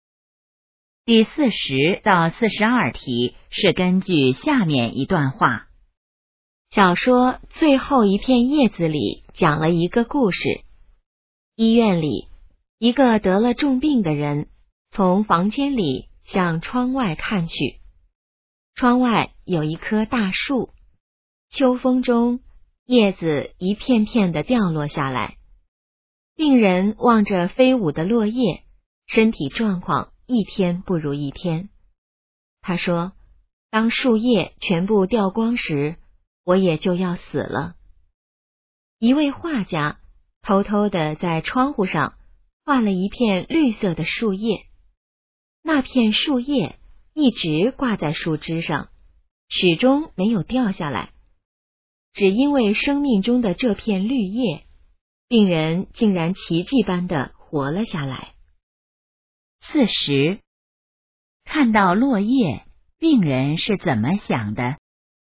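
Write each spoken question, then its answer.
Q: 看到落叶,病人是怎么想的?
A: 树叶全部掉光时,自己也就要死了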